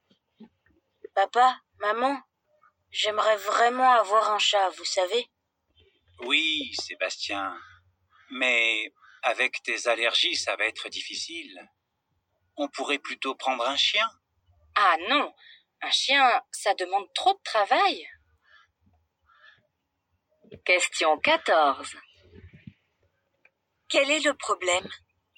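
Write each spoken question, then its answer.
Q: Quel est le problème ?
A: Sébastien a des allergies, donc avoir un chat serait difficile.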